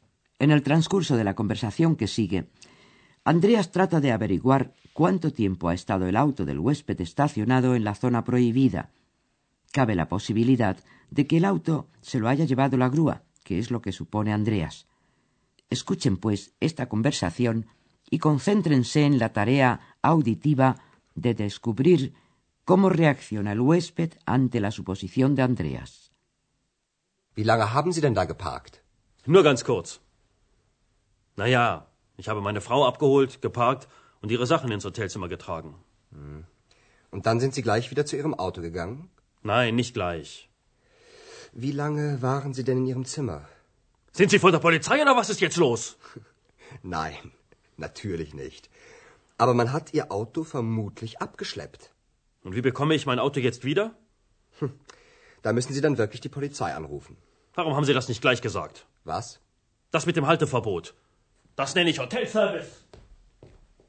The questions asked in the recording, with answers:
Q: concéntrense en la tarea auditiva de descubrir cómo reacciona el huésped ante la suposición de Andreas.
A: Como todos los débiles, el huésped descarga su enfado por una falta propia en un tercero.